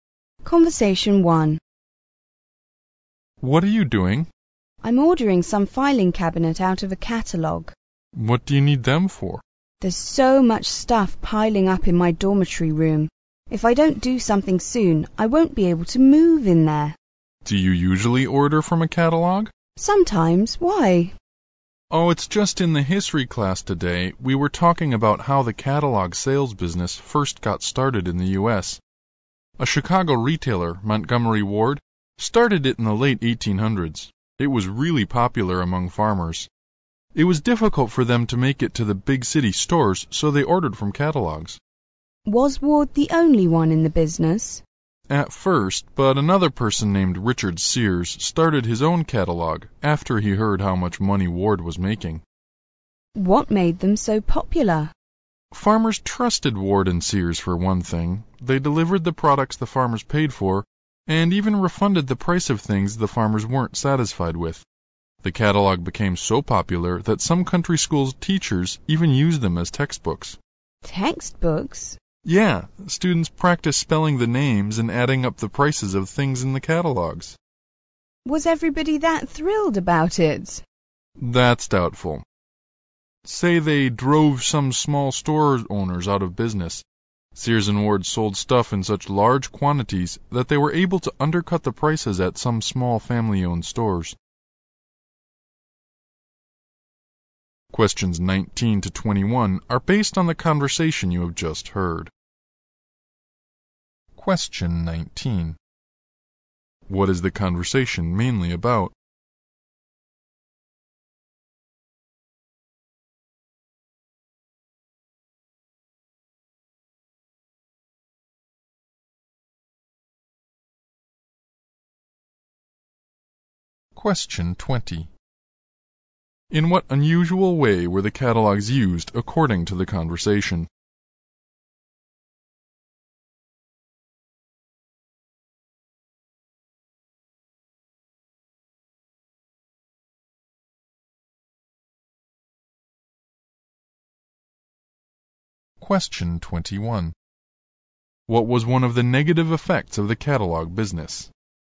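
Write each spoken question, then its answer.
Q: What is the conversation mainly about?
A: The history of the catalog sales business in the U.S.

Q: In what unusual way were the catalogs used according to the conversation?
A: As textbooks in country schools

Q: What was one of the negative effects of the catalog business?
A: It drove some small store owners out of business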